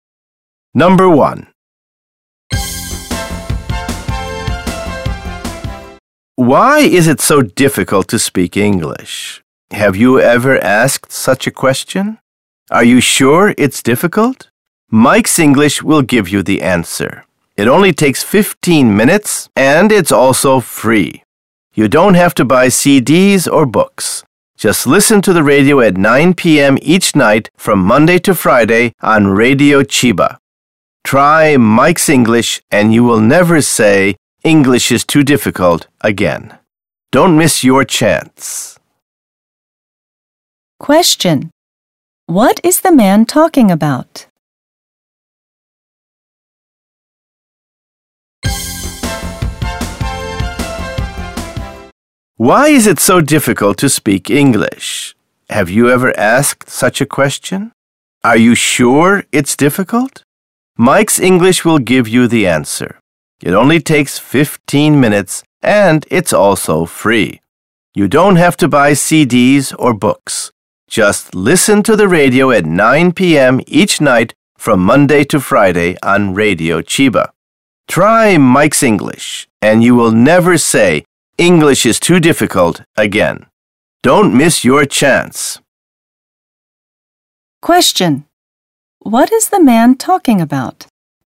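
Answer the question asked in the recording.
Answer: A free English radio program (Mike's English)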